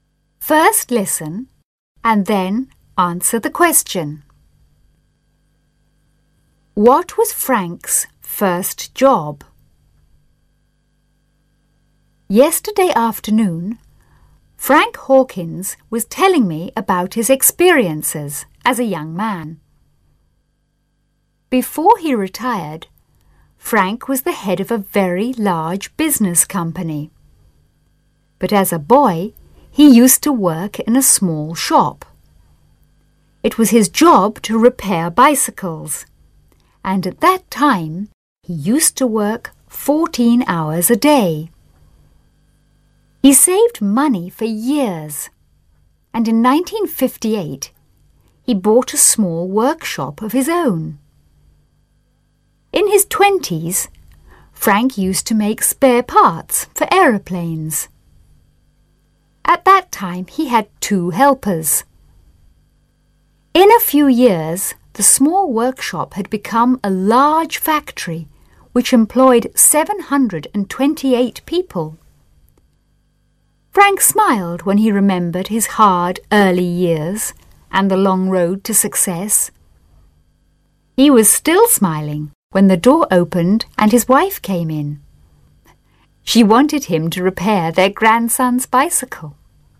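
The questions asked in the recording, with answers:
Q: What was Frank's first job?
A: He repaired bicycles in a small shop.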